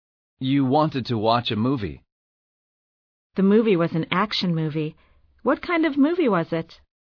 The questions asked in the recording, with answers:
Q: What kind of movie was it?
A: It was an action movie.